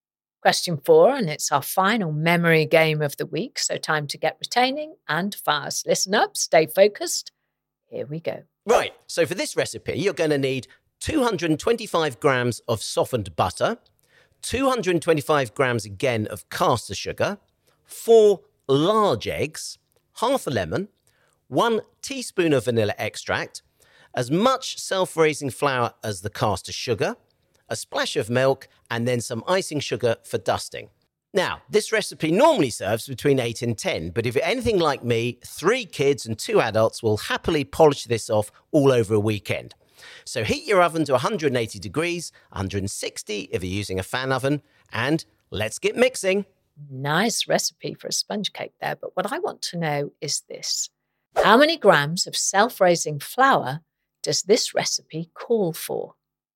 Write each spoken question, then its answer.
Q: How many grams of self-raising flour does this recipe call for?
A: And the answer I was looking for was 225 grams, the same as butter and caster sugar in the recipe.